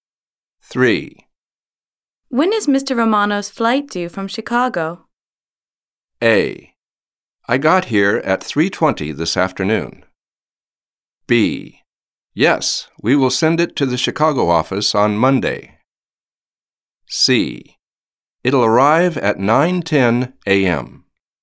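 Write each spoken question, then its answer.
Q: When is Mr. Romano's flight due from Chicago?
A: C: It'll arrive at 9:10 a.m.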